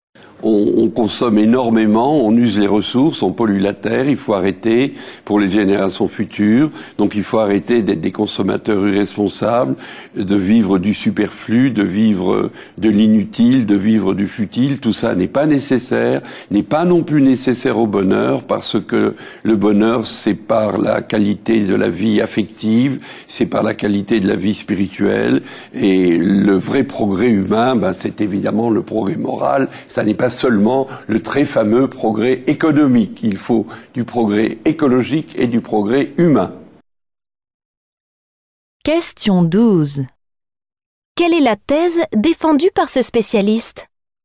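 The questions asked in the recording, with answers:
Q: Quelle est la thèse défendue par ce spécialiste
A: Il faut arrêter la surconsommation ; le vrai progrès est moral et humain, pas seulement économique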